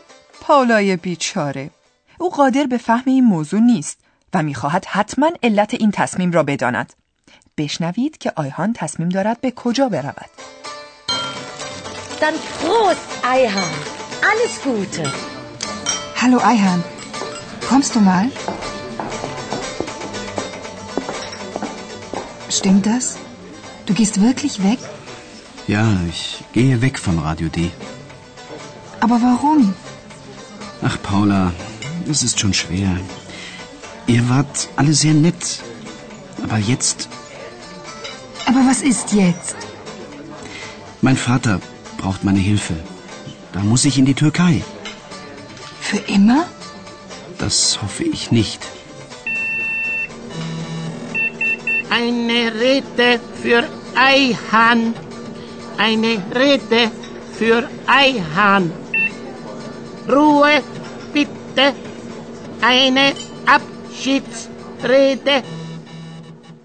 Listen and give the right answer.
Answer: شما حتما متوجه شدید که آیهان باید نزد پدرش به ترکیه برود.